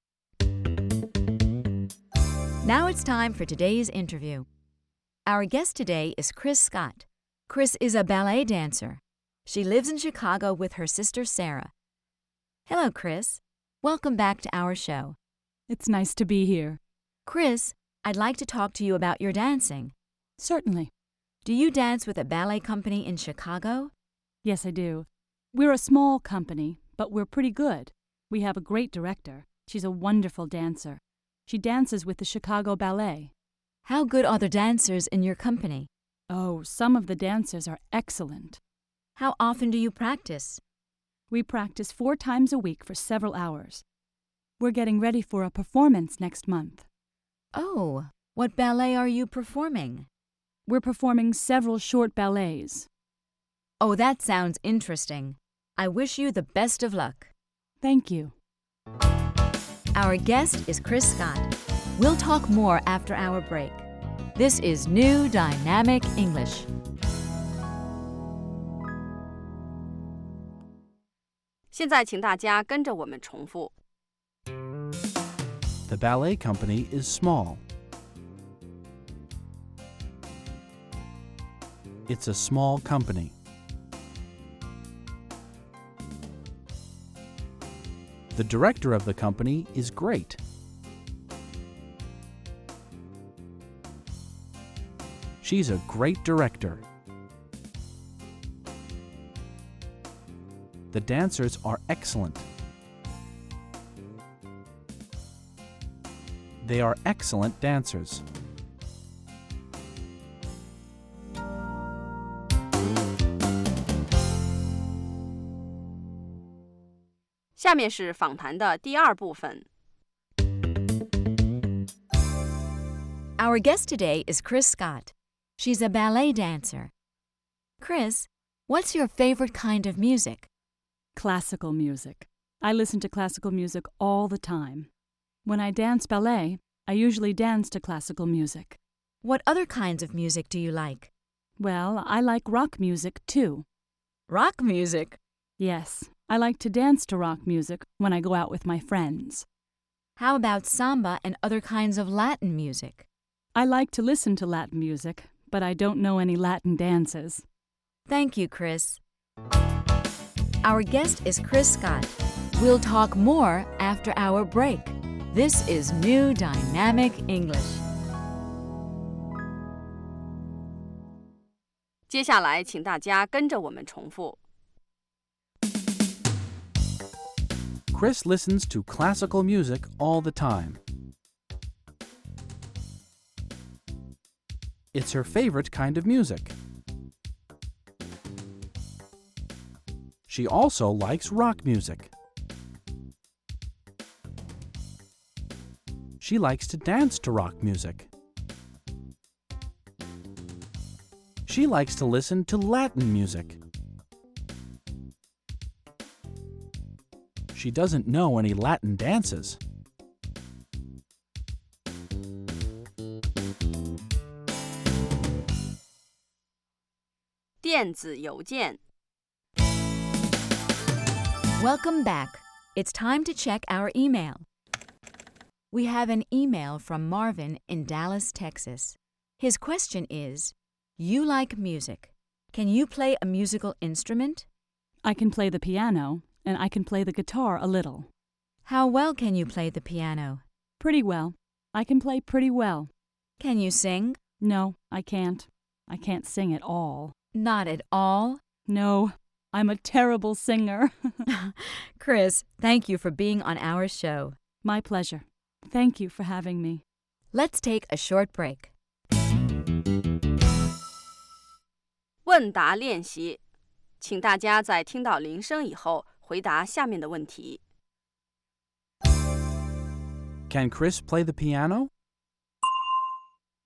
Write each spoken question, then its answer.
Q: Can Chris play the piano?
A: Yes, she can. She can play the piano pretty well.